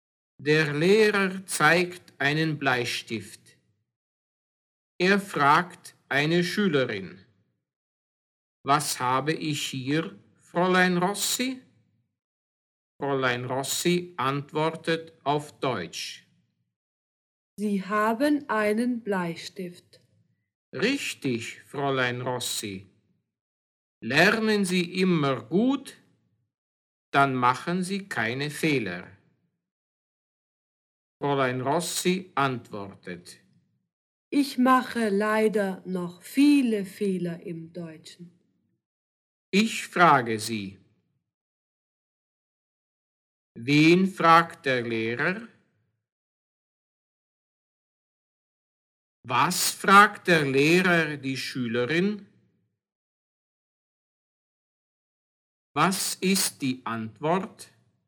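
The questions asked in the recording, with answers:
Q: Wen fragt der Lehrer?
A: Eine Schülerin, Fräulein Rossi

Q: Was fragt der Lehrer die Schülerin?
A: Was habe ich hier, Fräulein Rossi?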